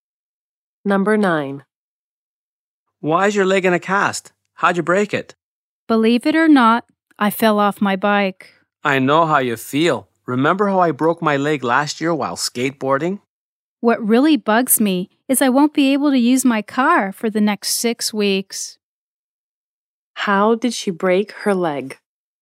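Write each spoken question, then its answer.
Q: How did she break her leg?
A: She fell off her bike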